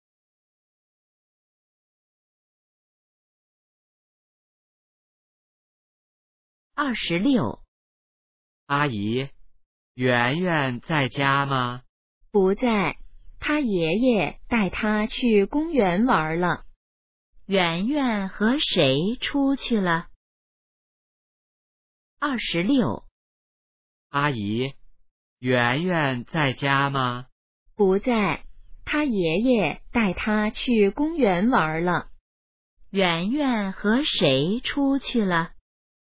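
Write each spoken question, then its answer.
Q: 圆圆和谁出去了?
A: 爷爷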